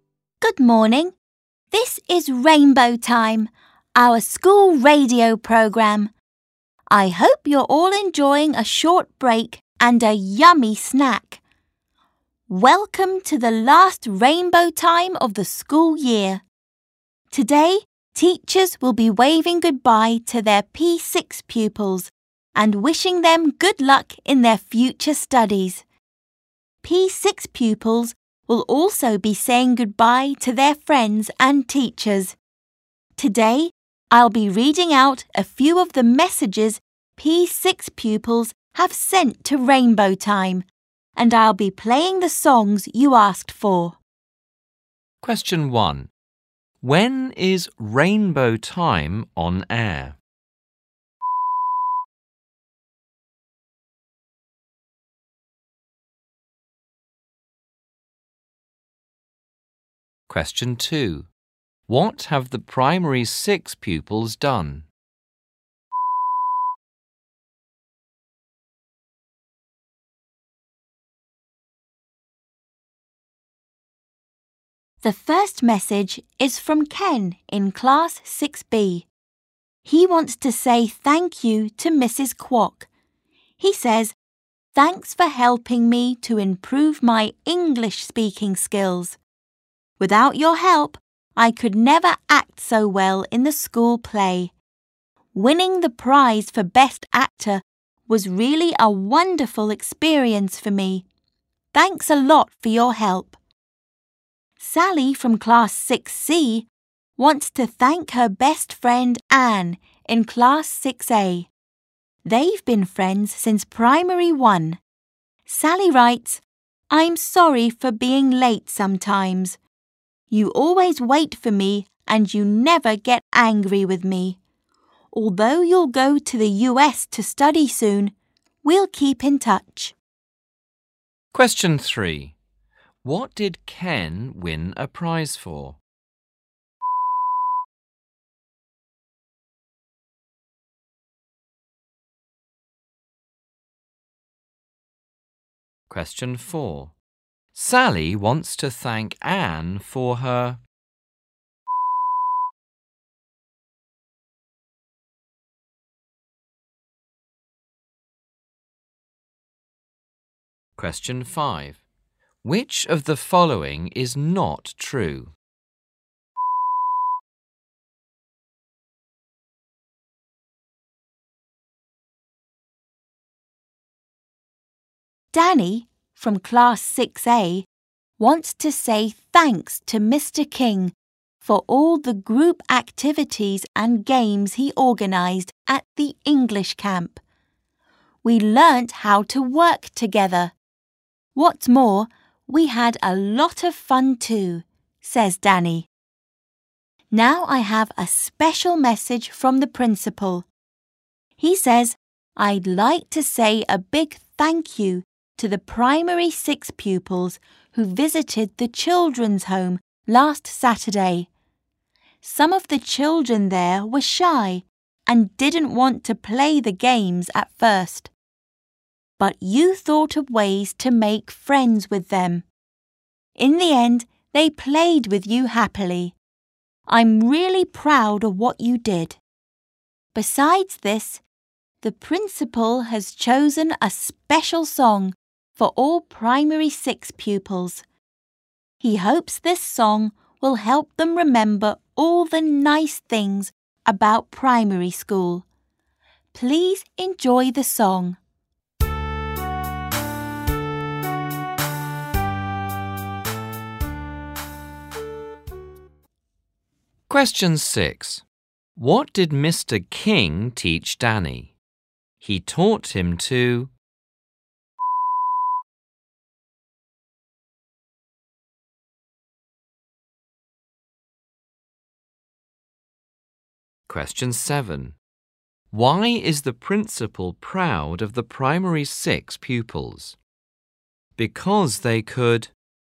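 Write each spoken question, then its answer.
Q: When is Rainbow Time on air?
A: During the short break (snack time) in the morning

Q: What did Ken win a prize for?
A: Best actor in the school play

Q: What did Mr. King teach Danny?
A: To work together

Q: Why is the principal proud of the primary 6 pupils?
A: They made friends with the shy children at the children's home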